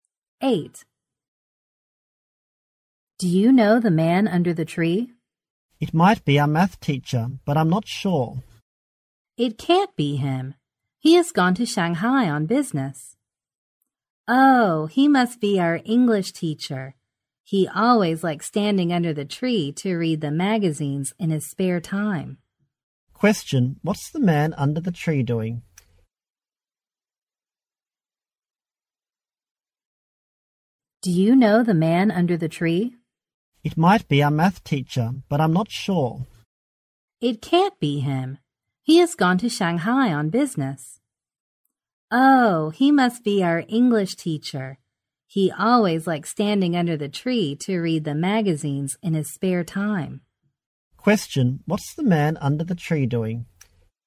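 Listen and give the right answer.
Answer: Reading magazines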